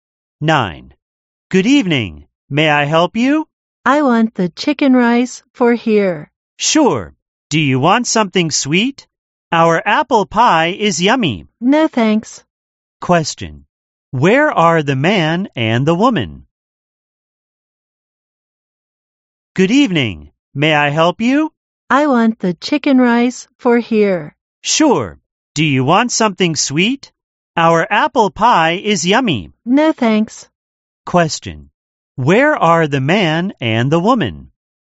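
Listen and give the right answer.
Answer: In a restaurant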